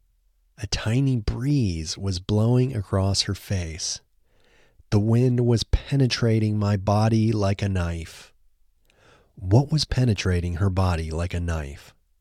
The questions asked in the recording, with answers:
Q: What was penetrating her body like a knife?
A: The wind was penetrating her body like a knife.